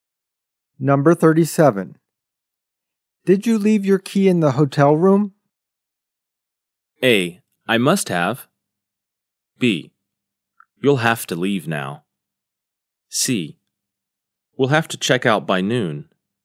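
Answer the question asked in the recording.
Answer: A: I must have.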